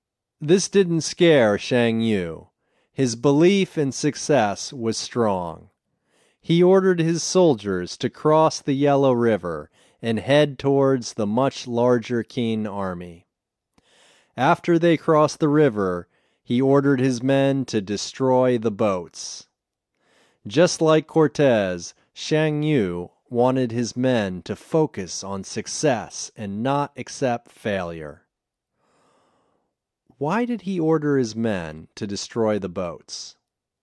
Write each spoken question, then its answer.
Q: Why did he order his men to destroy the boats?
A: He ordered his men to destroy the boats because he wanted them to focus on success and not accept failure.